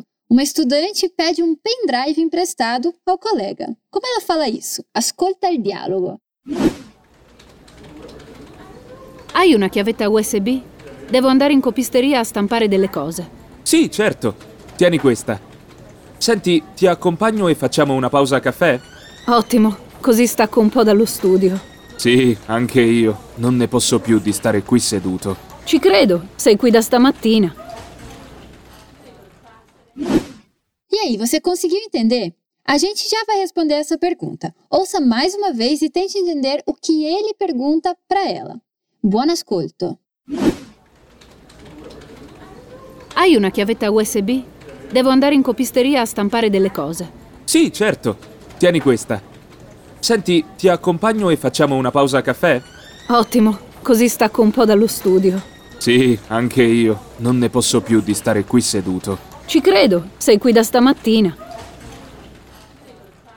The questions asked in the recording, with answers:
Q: Como ela fala isso?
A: Pendrive em italiano é chiavetta USB.